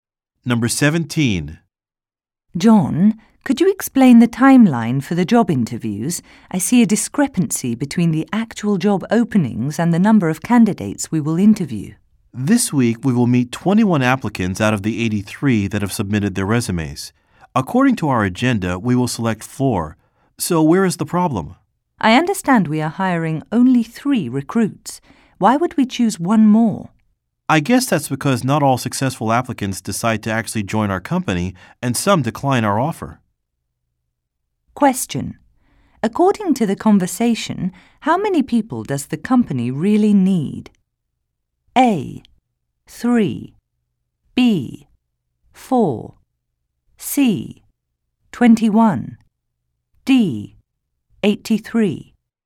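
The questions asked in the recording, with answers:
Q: According to the conversation, how many people does the company really need?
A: A: 3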